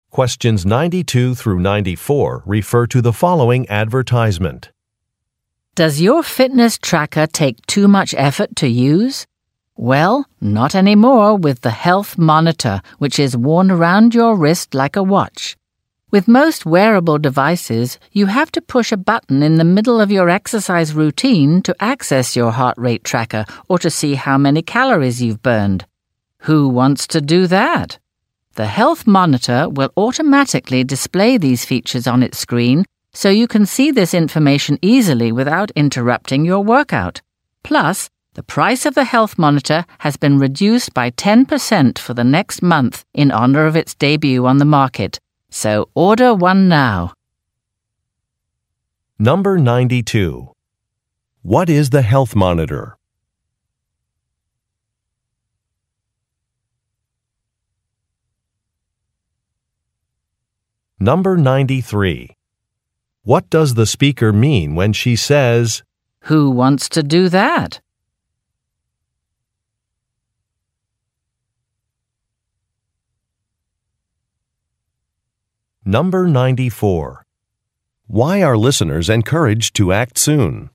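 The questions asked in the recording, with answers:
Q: What is the Health Monitor?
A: A wearable fitness tracker worn on the wrist

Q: What does the speaker mean when she says,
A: Pushing a button during exercise is inconvenient

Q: Why are listeners encouraged to act soon?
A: The price is reduced by 10% for the next month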